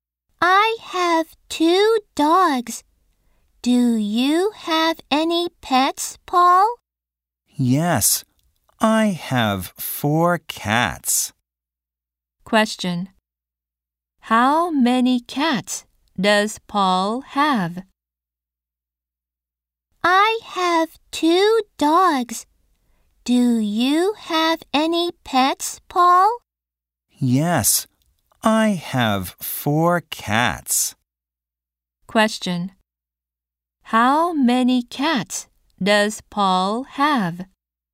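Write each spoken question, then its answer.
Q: How many cats does Paul have?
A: Four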